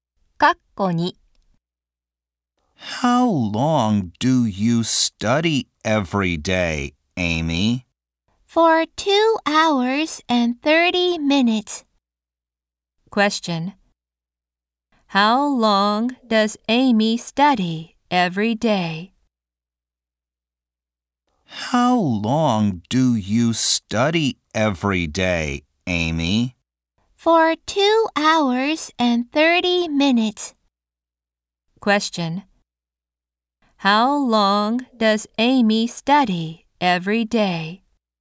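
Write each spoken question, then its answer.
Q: How long does Amy study every day?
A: 2 hours and 30 minutes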